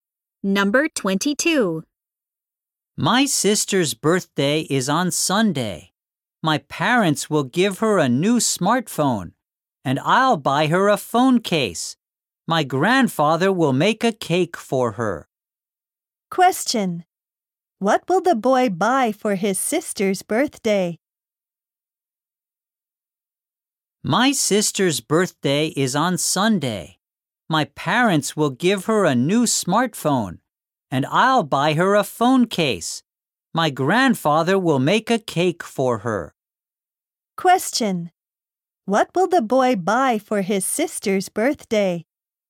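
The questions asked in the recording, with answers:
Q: What will the boy buy for his sister's birthday?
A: A phone case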